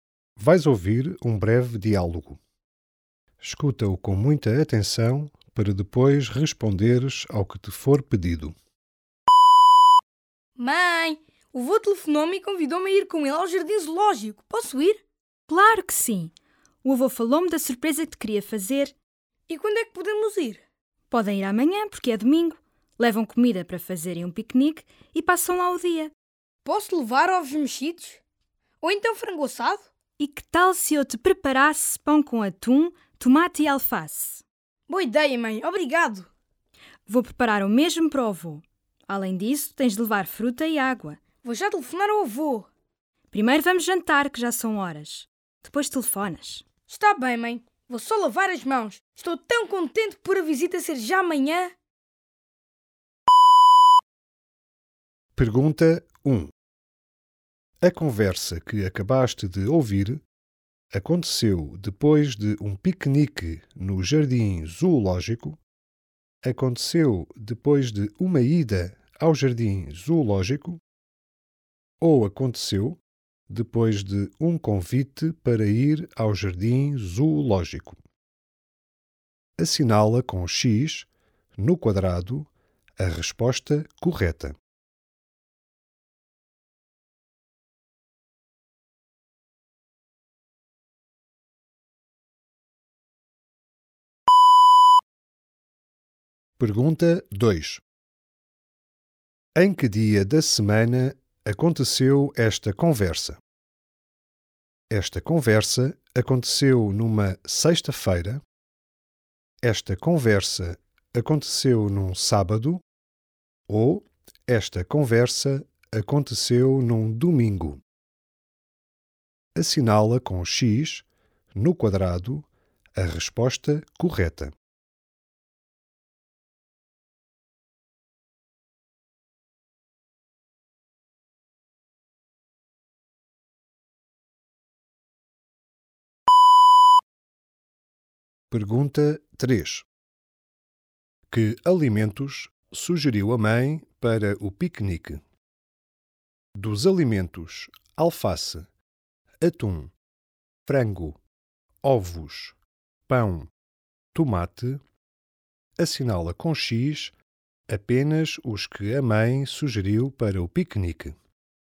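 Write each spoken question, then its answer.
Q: A conversa que acabaste de ouvir aconteceu depois de um piquenique no jardim zoológico?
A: Depois de um convite para ir ao jardim zoológico

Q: Em que dia da semana aconteceu esta conversa?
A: Num sábado

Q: Que alimentos sugeriu a mãe para o piquenique?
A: Pão, atum, tomate e alface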